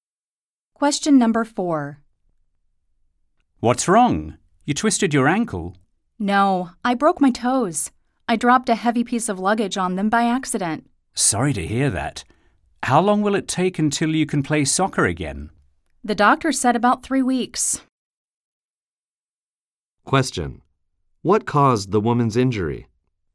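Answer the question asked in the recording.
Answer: She accidentally dropped a heavy piece of luggage on her toes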